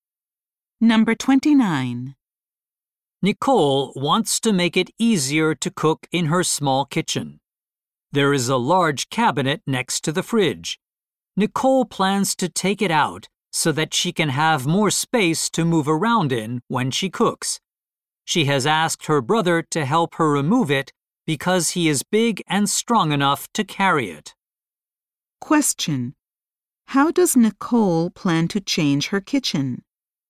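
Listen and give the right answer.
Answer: By removing the large cabinet next to the fridge.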